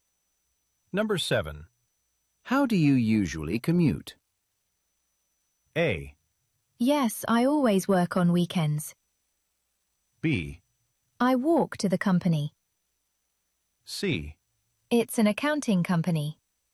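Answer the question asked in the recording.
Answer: B: I walk to the company.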